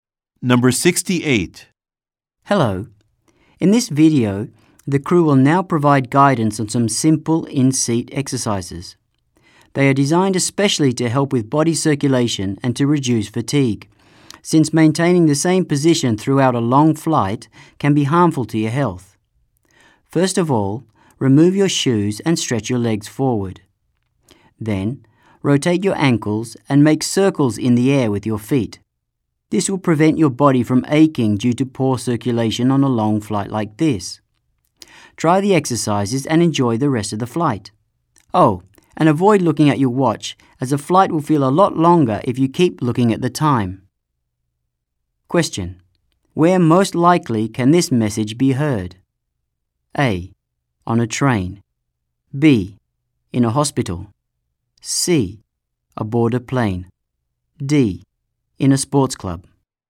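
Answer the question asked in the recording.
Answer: C: Aboard a plane.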